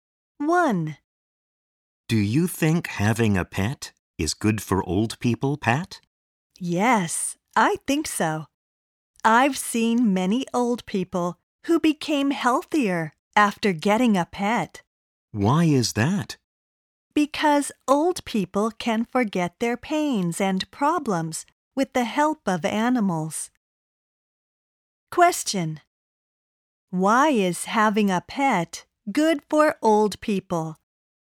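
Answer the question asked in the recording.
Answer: Because old people can forget their pains and problems with the help of animals.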